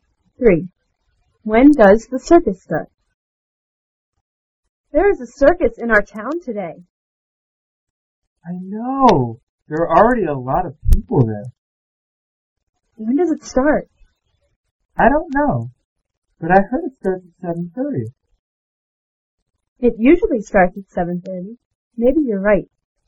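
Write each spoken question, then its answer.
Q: When does the circus start?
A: At 7:30.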